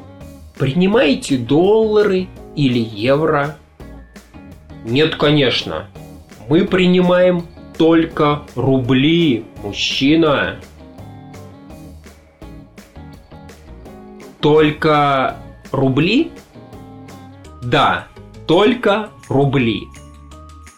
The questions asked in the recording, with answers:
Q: Принимаете доллары или евро?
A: Нет, конечно. Мы принимаем только рубли, мужчина.